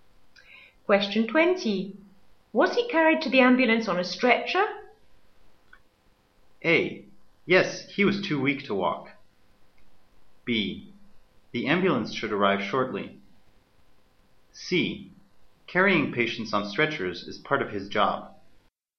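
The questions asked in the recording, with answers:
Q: Was he carried to the ambulance on a stretcher?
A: A: Yes, he was too weak to walk.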